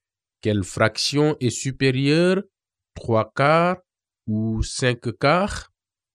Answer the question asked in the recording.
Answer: 5 quarts est supérieur à 3 quarts, car le numérateur 5 est supérieur au numérateur 3.